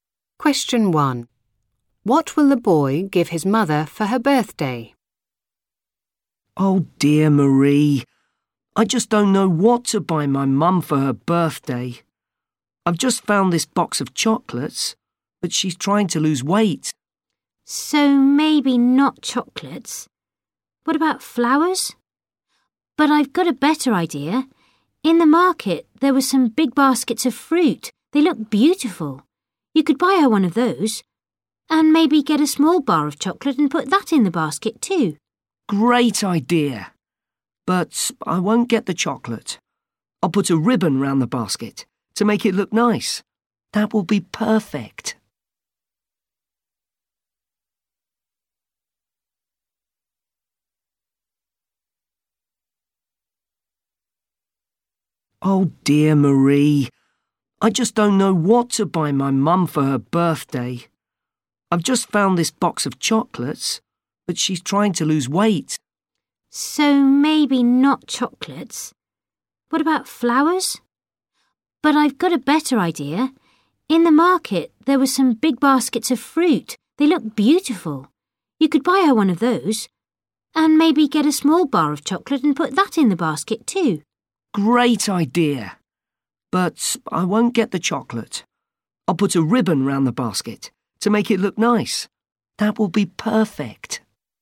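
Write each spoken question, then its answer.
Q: What will the boy give his mother for her birthday?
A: A basket of fruit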